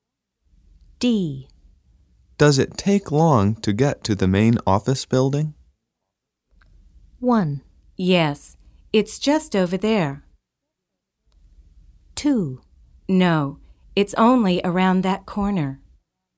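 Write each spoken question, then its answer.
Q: Does it take long to get to the main office building?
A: 2: No, it's only around that corner.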